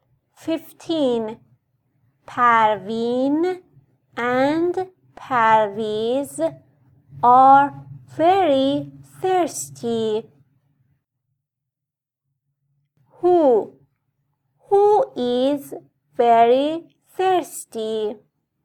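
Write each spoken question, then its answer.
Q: Who is very thirsty?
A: Parveen and Parviz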